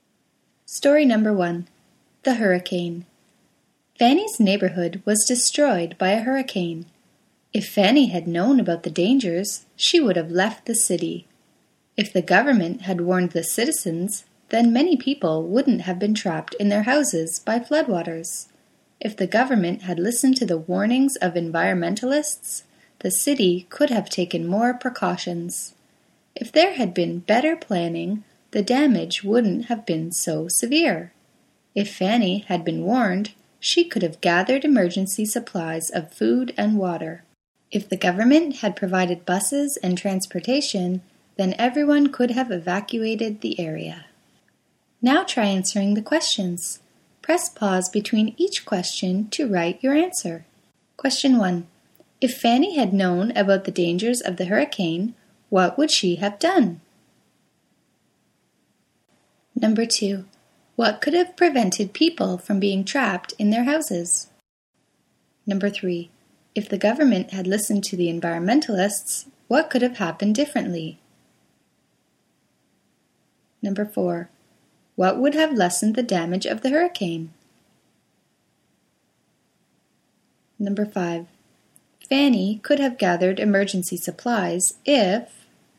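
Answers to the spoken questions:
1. She would have left the city.
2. If the government had warned the citizens.
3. The city could have taken more precautions.
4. Better planning.
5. she had been warned.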